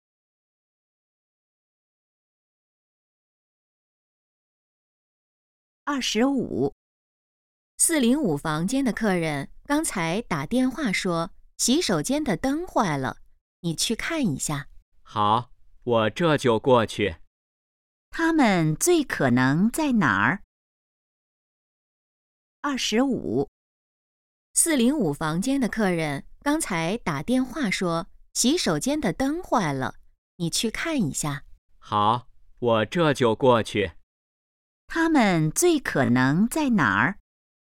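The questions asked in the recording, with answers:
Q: 他们最可能在哪儿?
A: 宾馆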